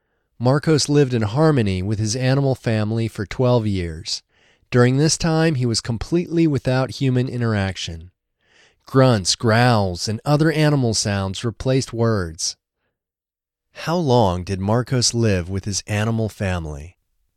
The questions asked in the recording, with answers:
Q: How long did Marcos live with his animal family?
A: Marcos lived with his animal family for 12 years.